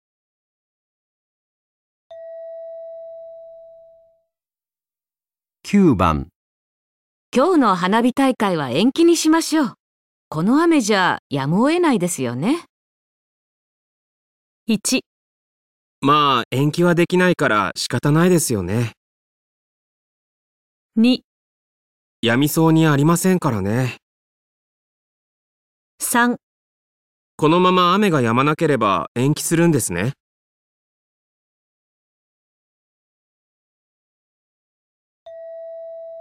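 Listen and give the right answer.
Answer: やみそうにありませんからね

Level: N2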